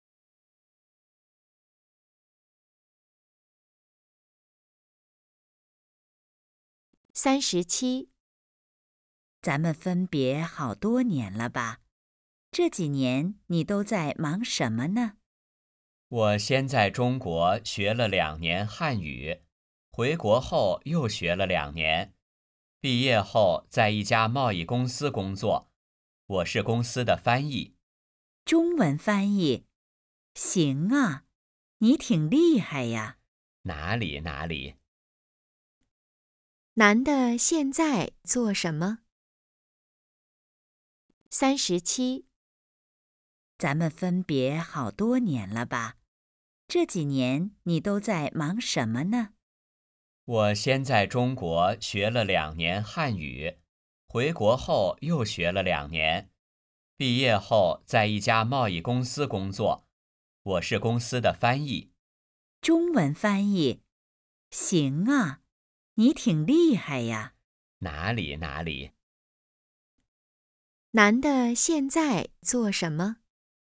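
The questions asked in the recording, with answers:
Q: 男的现在做什么?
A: 公司翻译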